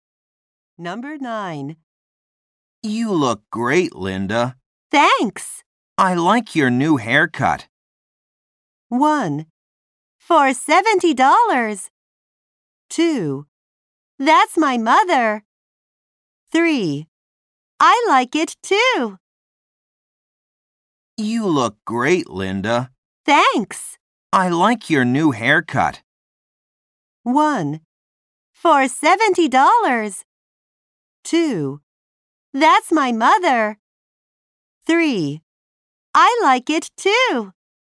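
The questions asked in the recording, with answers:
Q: I like your new haircut.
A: 3: I like it too.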